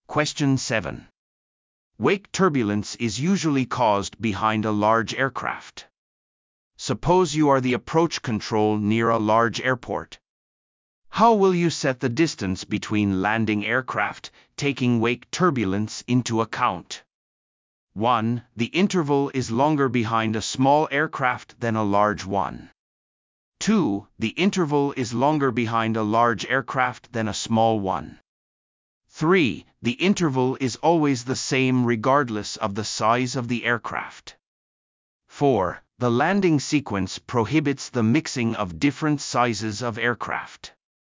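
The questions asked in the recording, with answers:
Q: How will you set the distance between landing aircraft, taking wake turbulence into account?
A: 2: The interval is longer behind a large aircraft than a small one.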